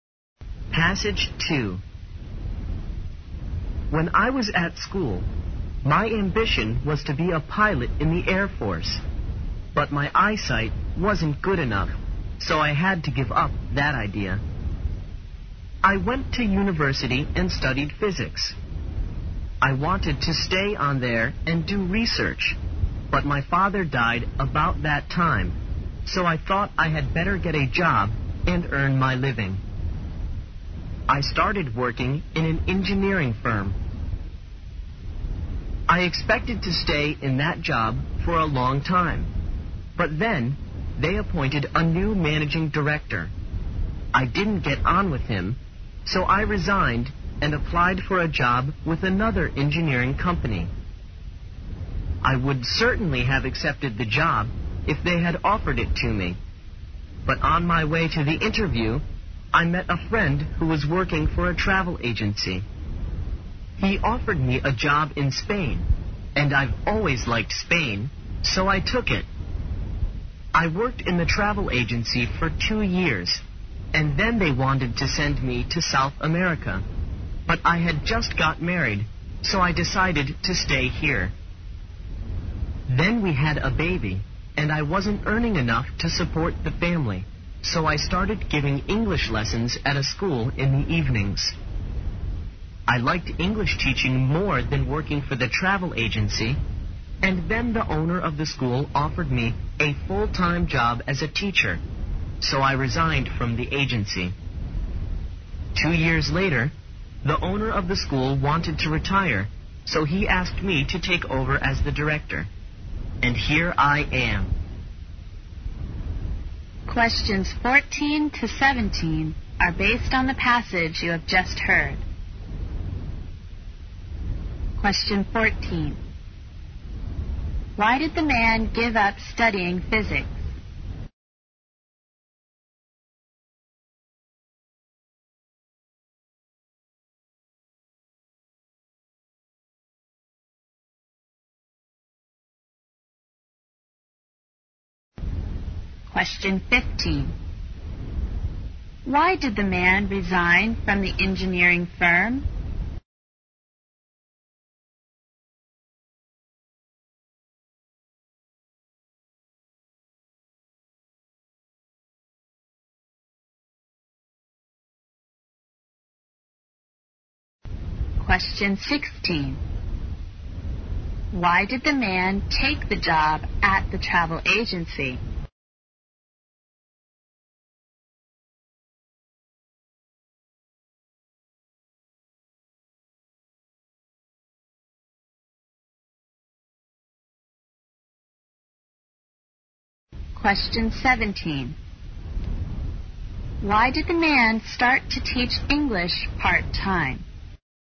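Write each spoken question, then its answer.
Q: Why did the man give up studying physics?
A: His father died, so he had to earn a living

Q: Why did the man resign from the engineering firm?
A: He didn't get on with the new managing director

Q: Why did the man take the job at the travel agency?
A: It was a job in Spain, and he had always liked Spain

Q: Why did the man start to teach English part-time?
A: He wasn't earning enough to support his family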